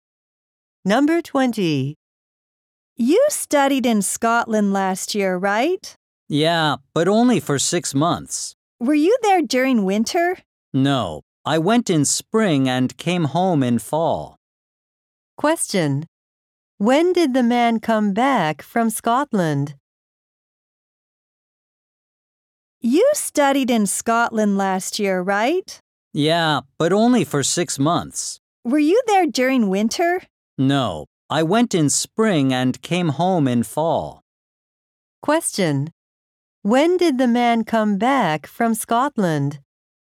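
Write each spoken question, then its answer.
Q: When did the man come back from Scotland?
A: In the fall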